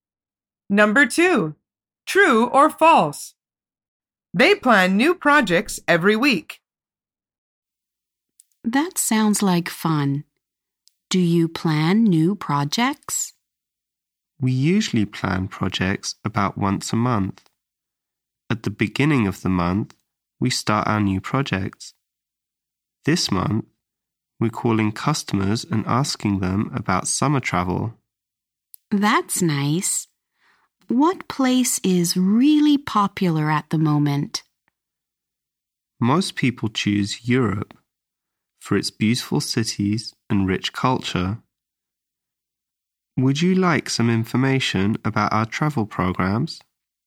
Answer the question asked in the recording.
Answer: The answer is false. He says, we usually plan projects about once a month.